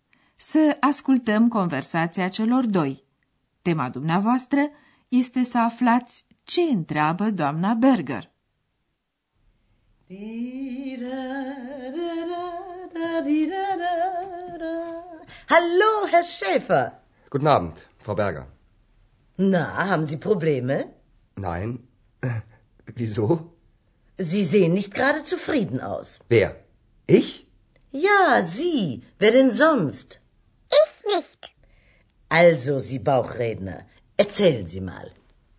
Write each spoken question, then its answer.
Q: Tema dumneavoastră este să aflați ce întreabă doamna Berger.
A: Domna Berger îl întreabă așadar pe Andreas dacă are probleme.